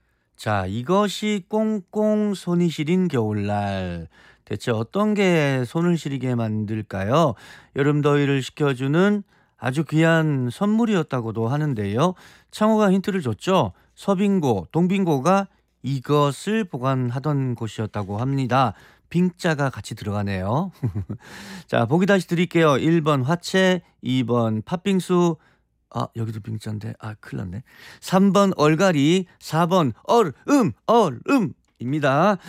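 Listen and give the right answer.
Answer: 4: 얼음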